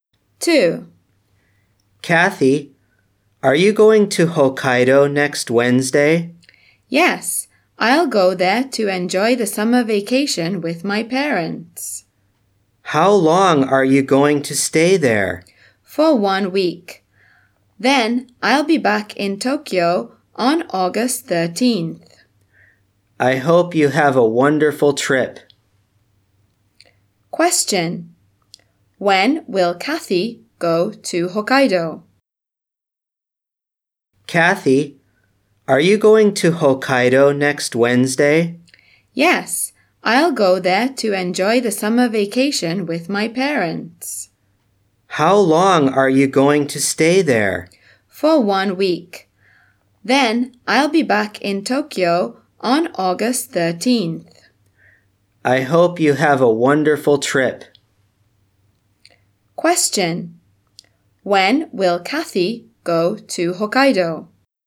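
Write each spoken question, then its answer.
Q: When will Kathy go to Hokkaido?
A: Next Wednesday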